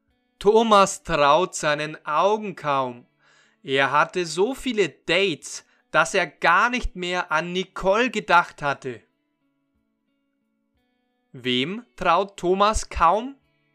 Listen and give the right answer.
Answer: Seinen Augen. Er traut seinen Augen kaum.